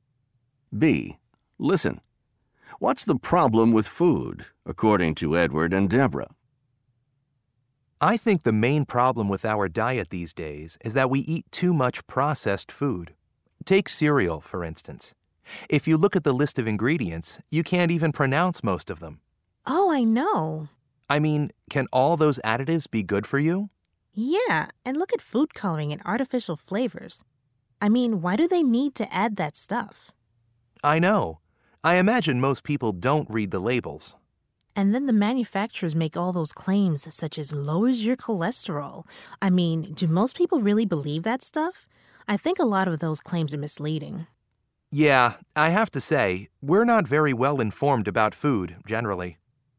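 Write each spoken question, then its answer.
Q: What's the problem with food, according to Edward and Deborah?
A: We eat too much processed food with additives and artificial ingredients, and people aren't well informed because they don't read labels and believe misleading claims.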